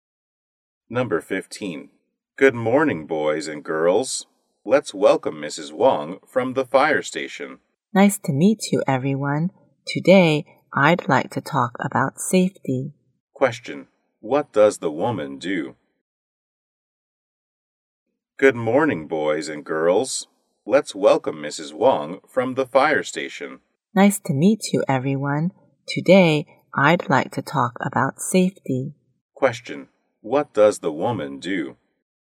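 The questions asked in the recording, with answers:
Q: What does the woman do?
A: A firefighter.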